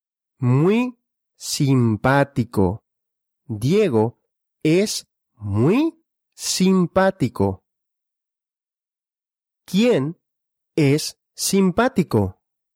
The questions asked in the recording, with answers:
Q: ¿Quién es simpático?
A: Diego, Diego es simpático.